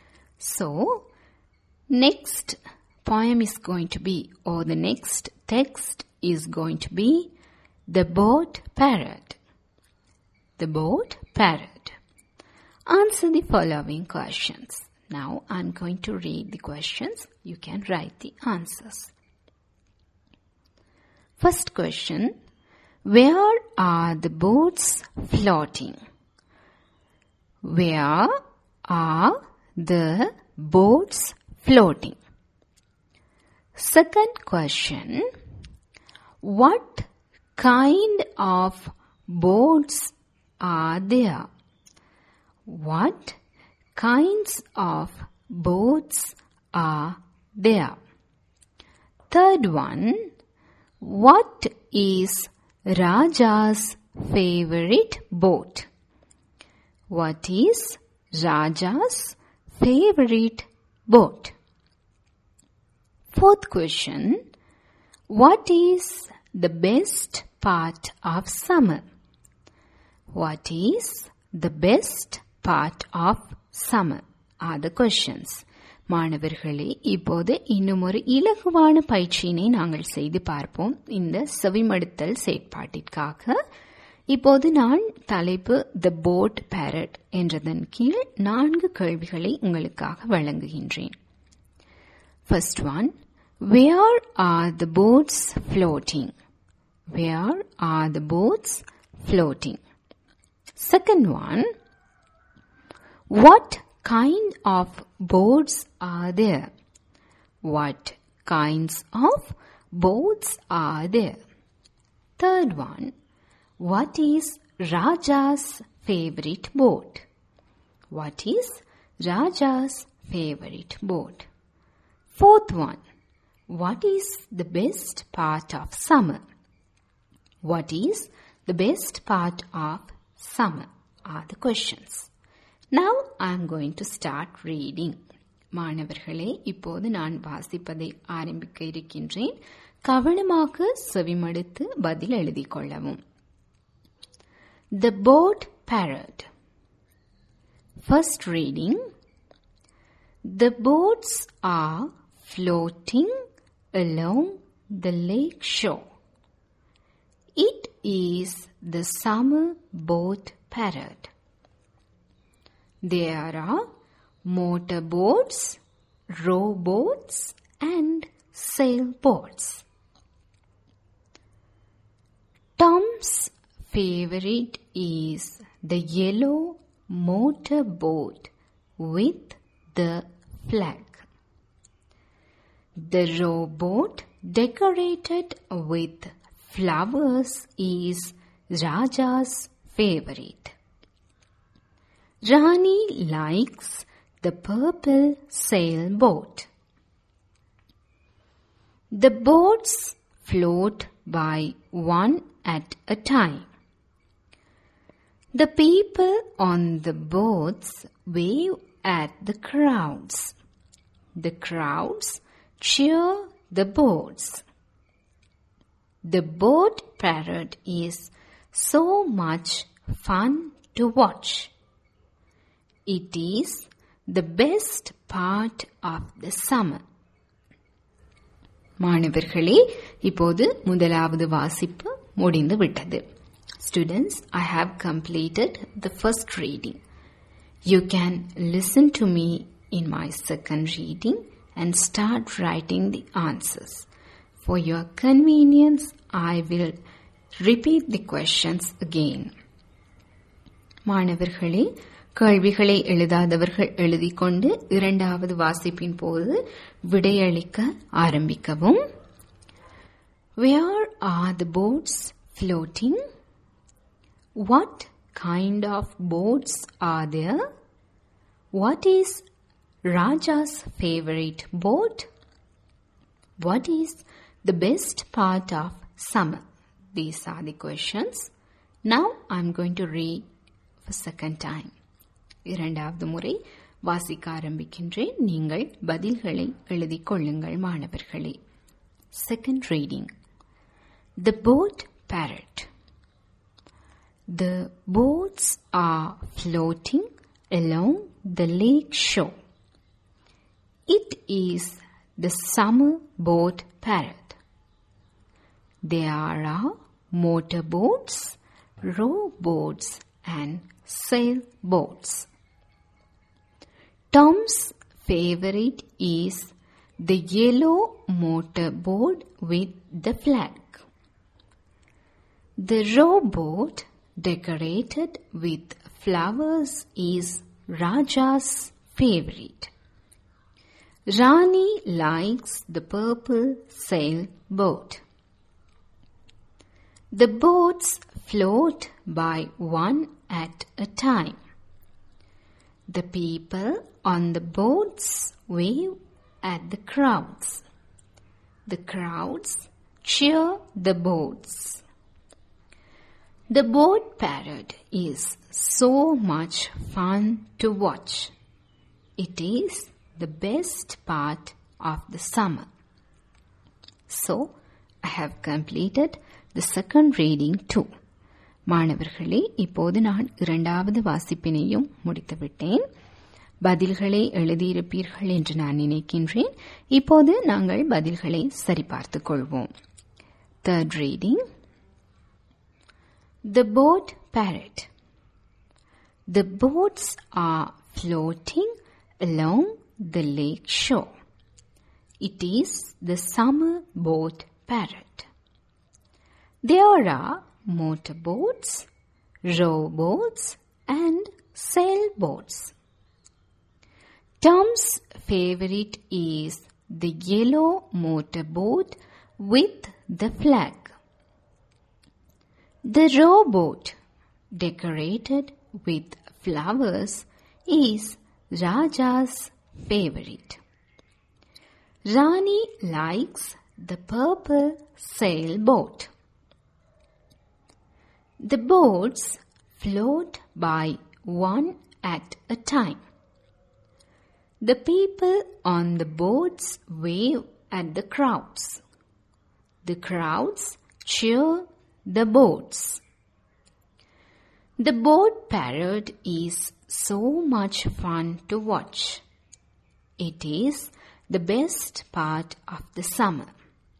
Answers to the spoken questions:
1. Along the lake shore is the correct answer.
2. The correct answer is motorboats, rowboats, and sailboats.
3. The answer is the rowboat decorated with flowers.
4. The correct answer is the boat parade.